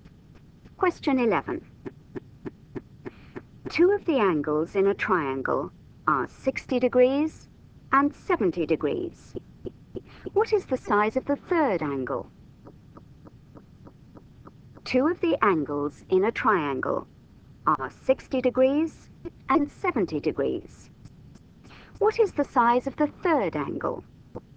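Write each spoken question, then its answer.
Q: What is the size of the third angle?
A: 50 degrees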